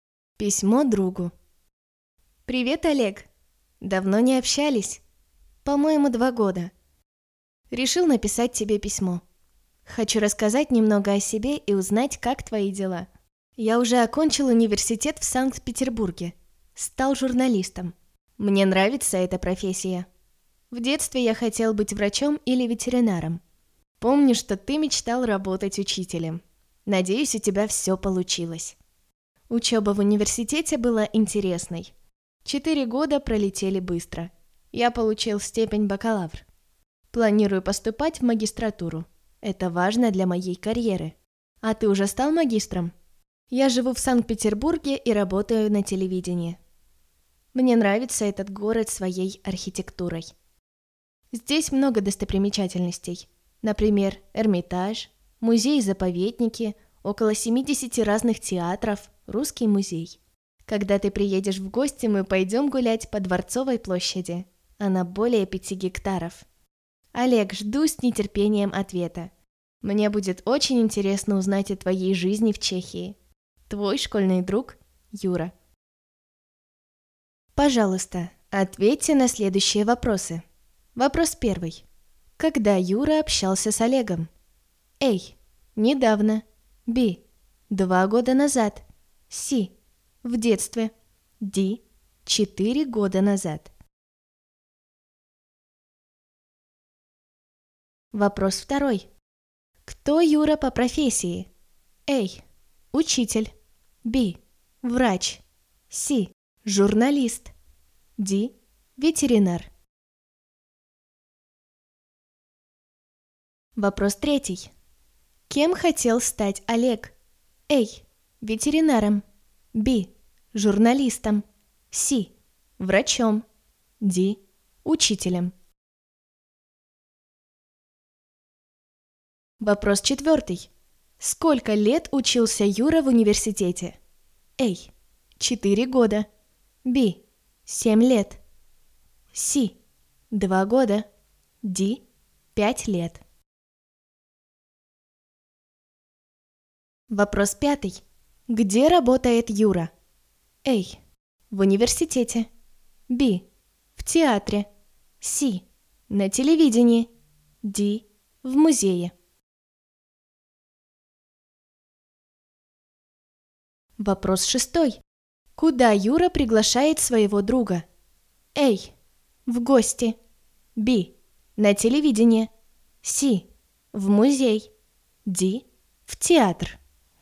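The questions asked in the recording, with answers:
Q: Когда Юра общался с Олегом?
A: B: 2 года назад.

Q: Кто Юра по профессии?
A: C: Журналист.

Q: Кем хотел стать Олег?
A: D: Учителем.

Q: Сколько лет учился Юра в университете?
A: A: 4 года.

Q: Где работает Юра?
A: C: На телевидении.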